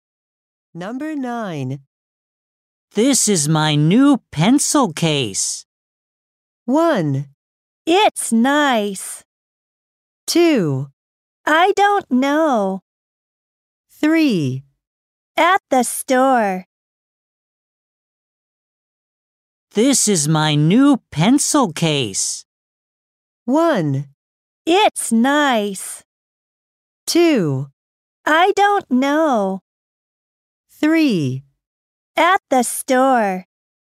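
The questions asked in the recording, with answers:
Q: This is my new pencil case.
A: 1: It's nice.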